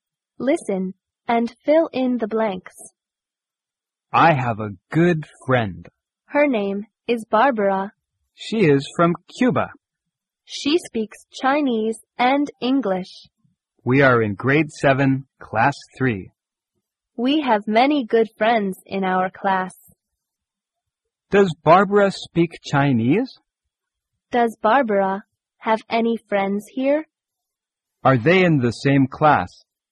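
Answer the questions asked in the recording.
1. Yes, she does.
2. Yes, she does.
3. Yes, they are.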